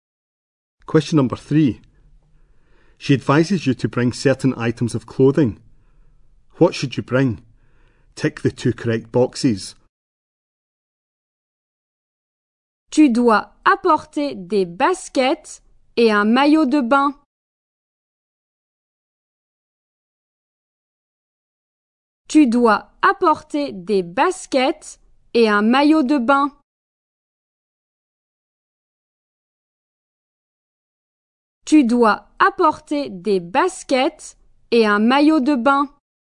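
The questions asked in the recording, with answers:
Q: What should you bring?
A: Trainers and a swimsuit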